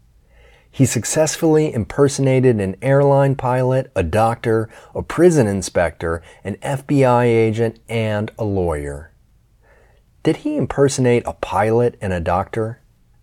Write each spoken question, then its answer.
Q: Did he impersonate a pilot and a doctor?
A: Yes, he impersonated a pilot and a doctor.